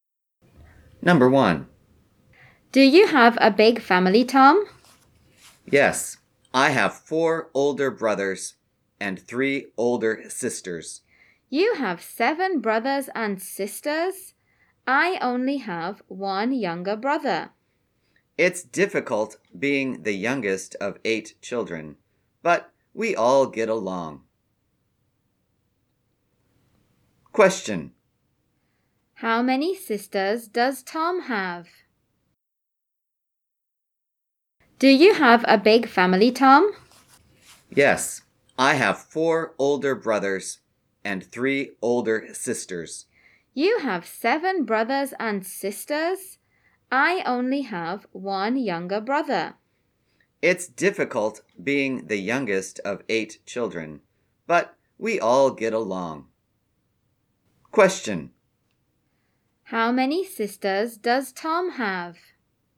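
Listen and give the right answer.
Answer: Three (3 older sisters)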